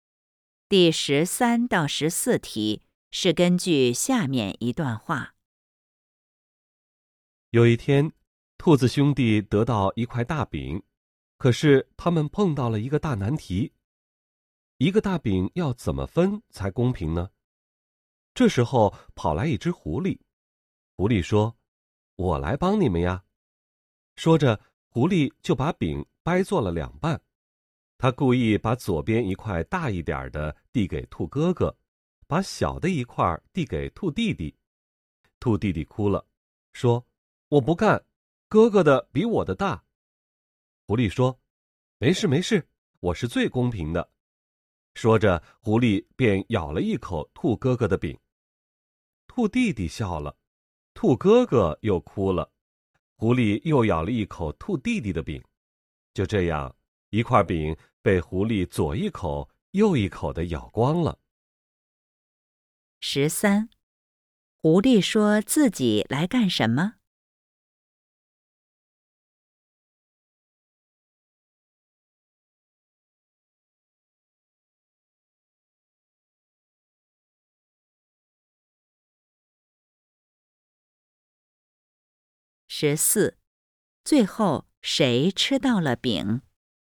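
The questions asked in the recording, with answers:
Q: 狐狸说自己来干什么?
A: 帮兔子兄弟分饼

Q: 最后谁吃到了饼?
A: 狐狸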